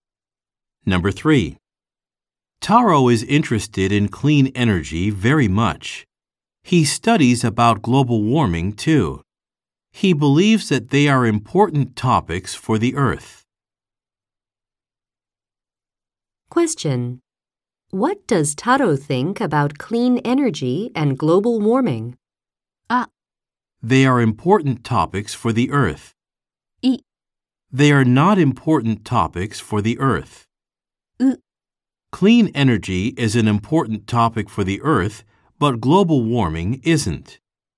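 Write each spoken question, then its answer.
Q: What does Taro think about clean energy and global warming?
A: A: They are important topics for the Earth.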